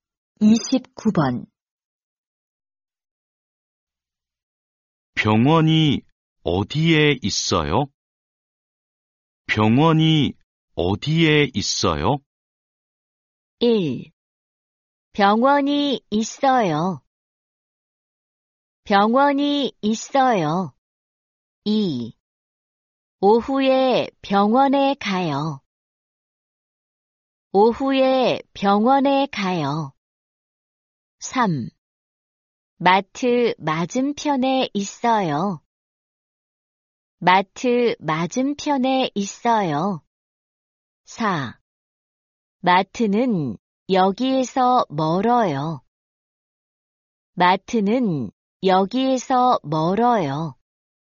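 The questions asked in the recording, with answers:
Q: 병원이 어디에 있어요?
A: 3: 마트 맞은편에 있어요.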